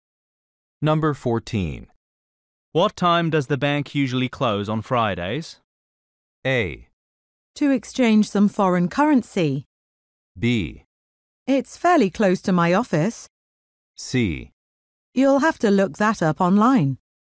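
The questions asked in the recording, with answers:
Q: What time does the bank usually close on Fridays?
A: C: You'll have to look that up online.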